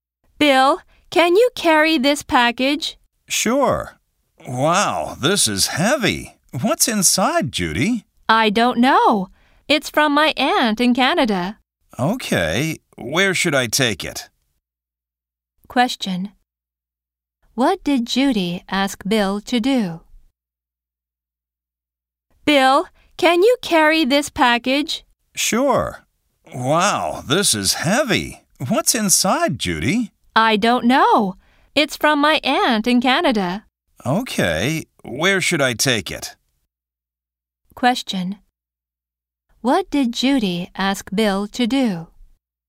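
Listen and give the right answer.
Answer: Carry a package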